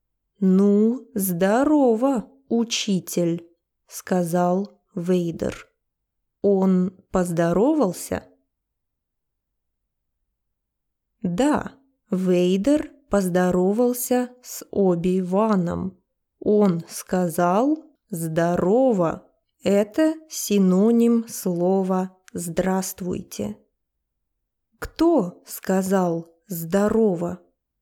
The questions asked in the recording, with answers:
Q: Кто сказал «здорово»?»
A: Дарт Вейдер сказал «здорово».